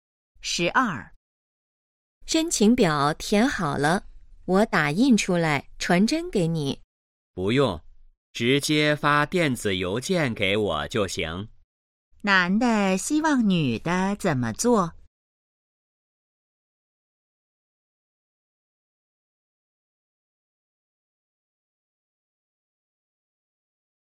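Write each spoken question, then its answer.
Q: 男的希望女的怎么做?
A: 发电子邮件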